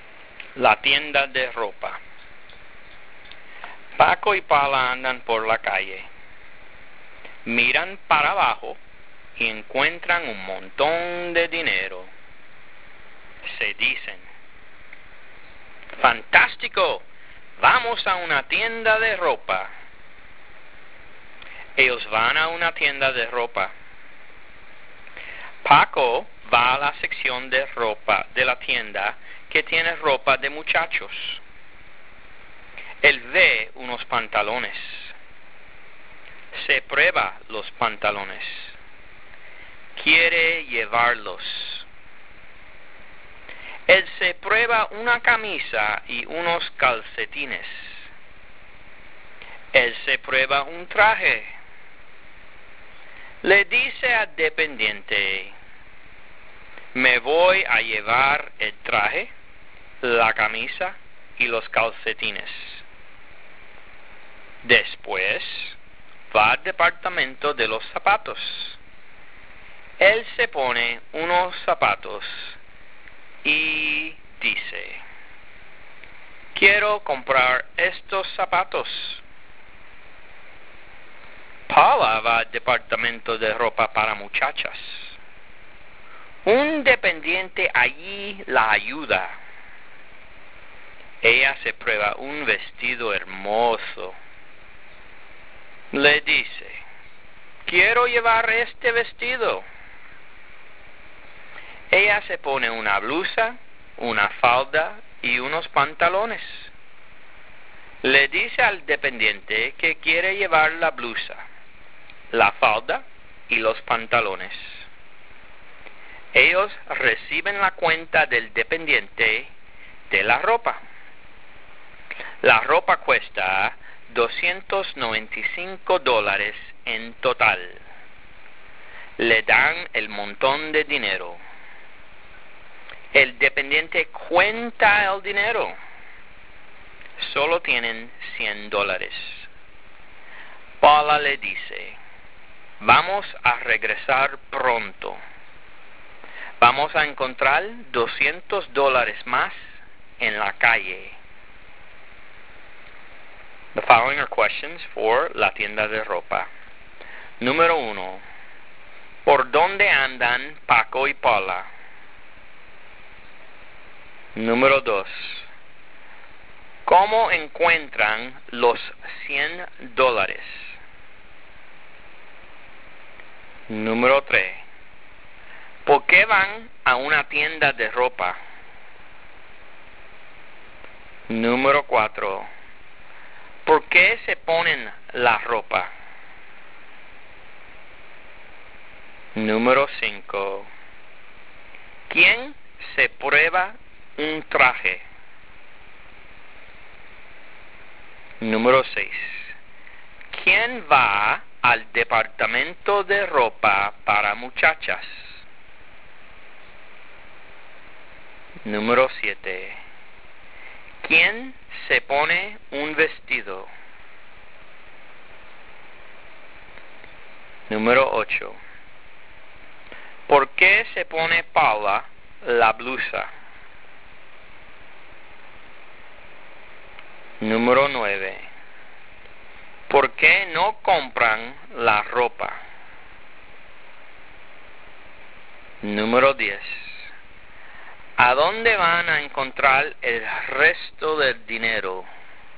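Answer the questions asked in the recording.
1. Por la calle
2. Miran para abajo y encuentran el dinero en la calle
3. Porque encuentran un montón de dinero
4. Para probársela, porque quieren comprarla
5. Paco
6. Paula
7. Paula
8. Para probársela; quiere llevarla
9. Porque solo tienen $100 y la ropa cuesta $295
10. En la calle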